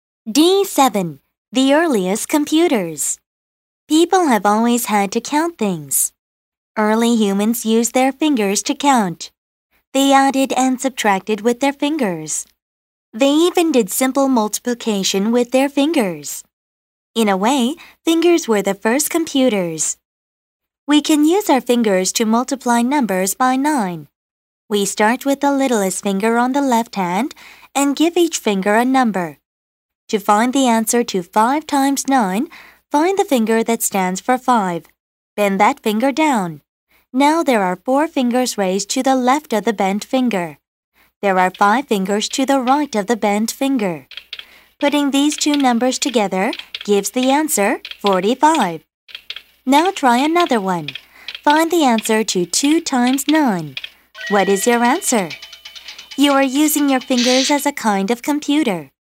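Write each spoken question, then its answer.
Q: Find the answer to 2 times 9. What is your answer?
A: 18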